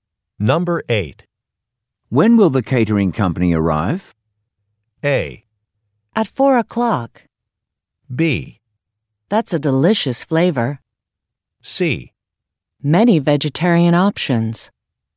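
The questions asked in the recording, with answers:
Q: When will the catering company arrive?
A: A: At 4 o'clock.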